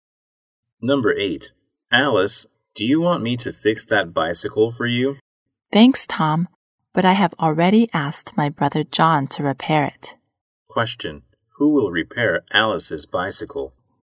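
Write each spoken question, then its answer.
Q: Who will repair Alice's bicycle?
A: Her brother John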